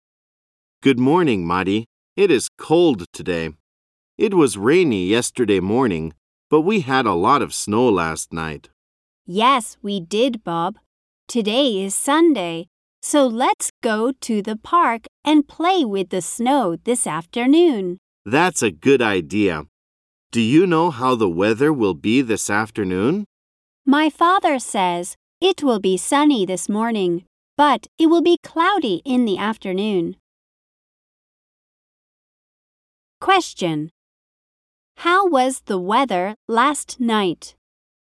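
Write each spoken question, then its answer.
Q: How was the weather last night?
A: It snowed a lot.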